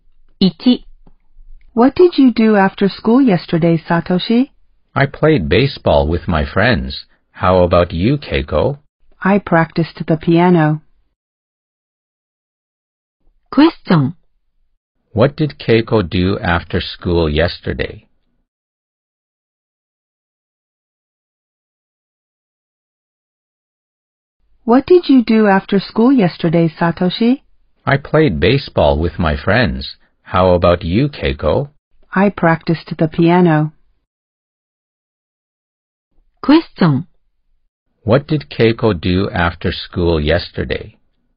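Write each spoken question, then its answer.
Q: What did Keiko do after school yesterday?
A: She practiced the piano.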